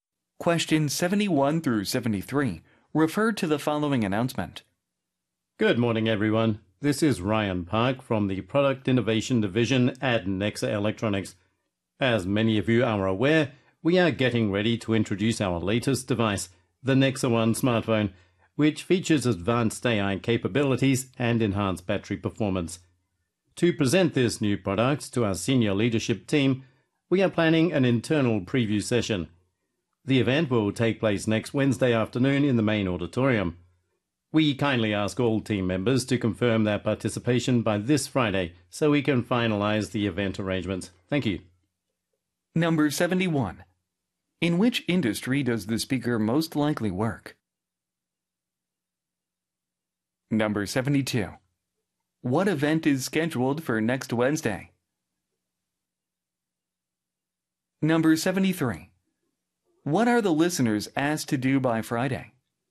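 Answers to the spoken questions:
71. Electronics
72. An internal preview session of a new smartphone
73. Confirm their participation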